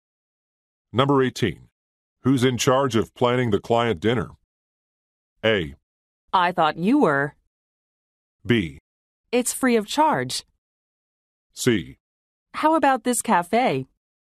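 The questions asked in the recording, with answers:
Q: Who's in charge of planning the client dinner?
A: A: I thought you were.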